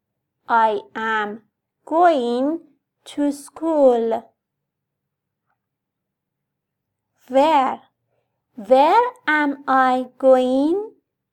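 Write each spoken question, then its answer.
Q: Where am I going?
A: to school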